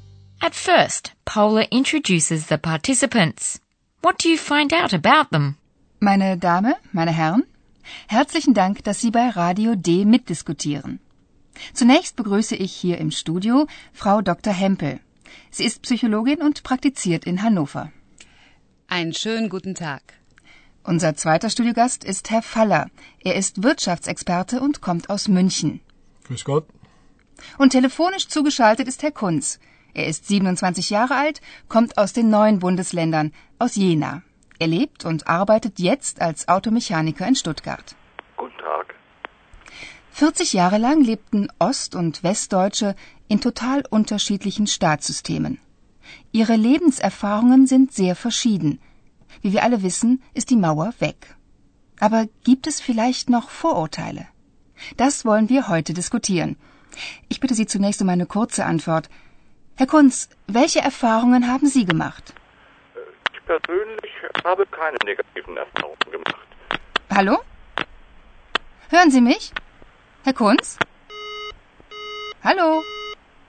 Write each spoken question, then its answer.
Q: What do you find out about them?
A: First, Paula welcomes Frau Hempel, a psychologist who practices in the North German city of Hanover.